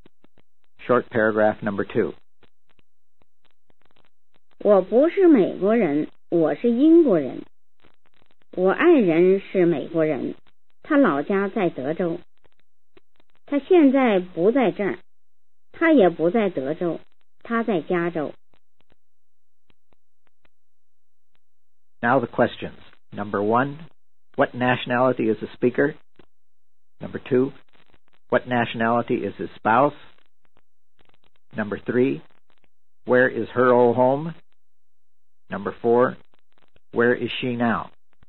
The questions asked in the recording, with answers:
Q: what nationality is the speaker?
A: English.

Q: what nationality is his spouse?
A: American.

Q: where is her old home?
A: Texas.

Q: where is she now?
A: California.